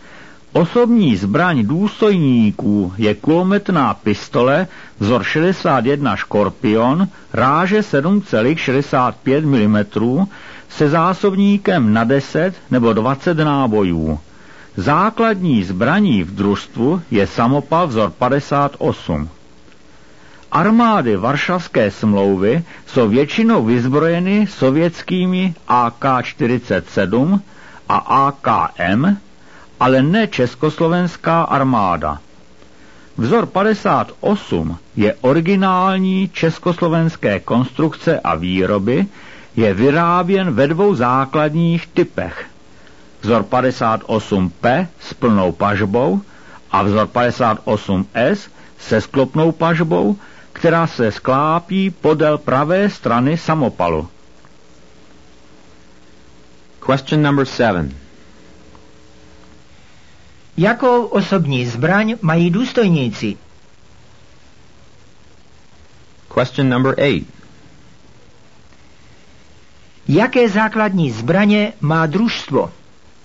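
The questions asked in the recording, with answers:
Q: Jakou osobní zbraň mají důstojníci?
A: Kulometnou pistoli vzor 61 Škorpion ráže 7,65 mm

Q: Jaké základní zbraně má družstvo?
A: Samopal vzor 58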